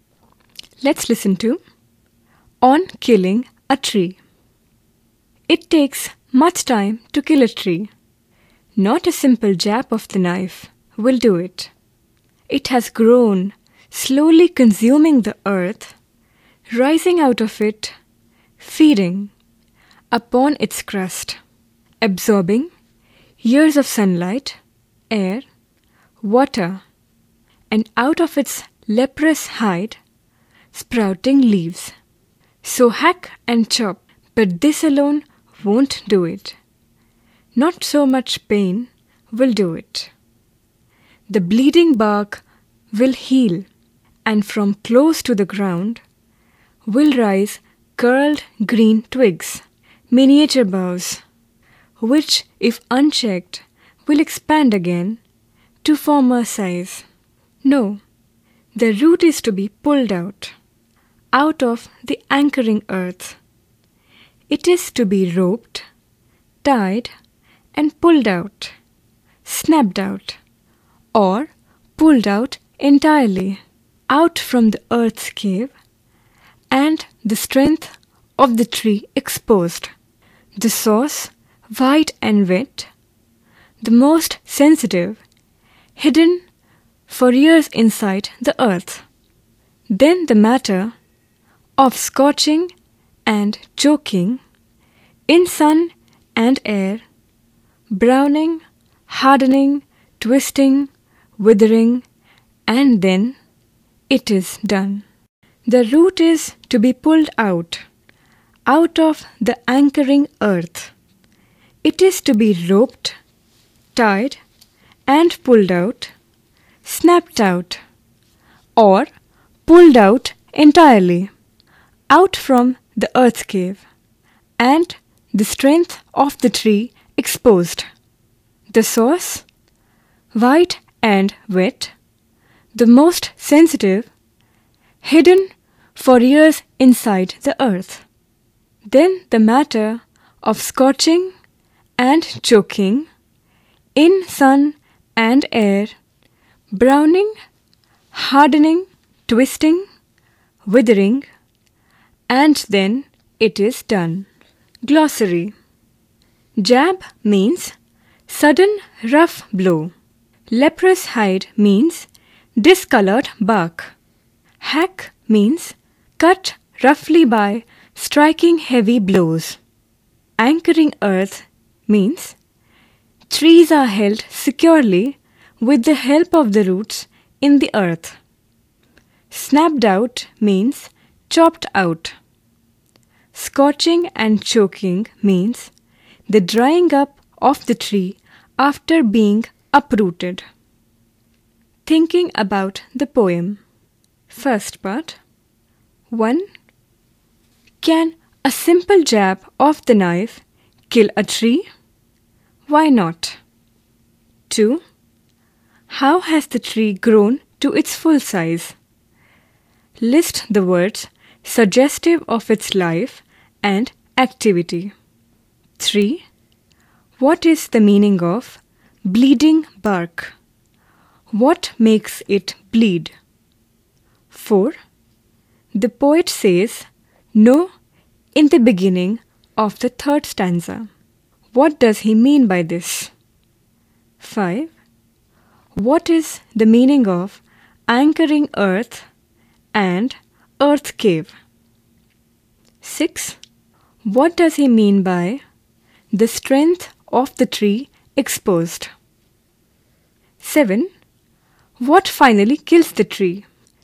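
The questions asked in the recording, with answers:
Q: Can a simple jab of the knife kill a tree?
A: No; the tree has grown slowly over many years and the wound will heal

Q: How has the tree grown to its full size?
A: Slowly, consuming the earth, feeding on its crust, absorbing years of sunlight, air and water

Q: What is the meaning of bleeding bark?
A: The bark cut by hacking, which oozes sap

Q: What is the meaning of anchoring earth and earth cave?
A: The earth that holds the tree firmly by its roots; the hole in the earth where the roots are

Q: What finally kills the tree?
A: Pulling out the root and leaving it to scorch and choke in sun and air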